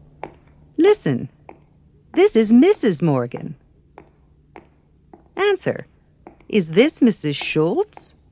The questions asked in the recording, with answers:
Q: Is this Mrs. Schultz?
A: No.